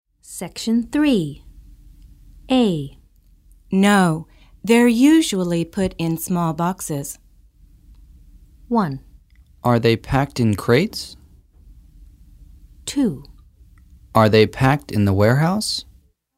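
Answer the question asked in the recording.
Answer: 1: Are they packed in crates?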